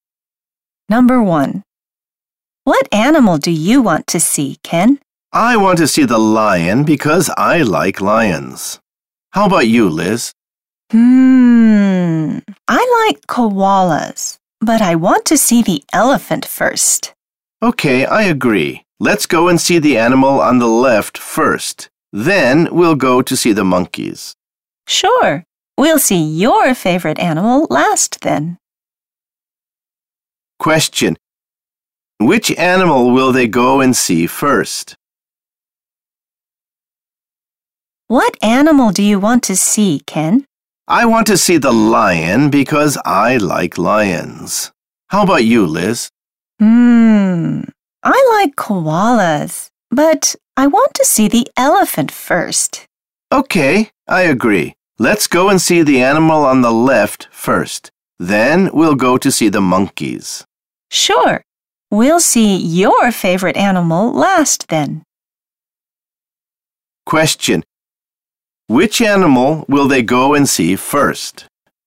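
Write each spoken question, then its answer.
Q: Which animal will they go and see first?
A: the elephant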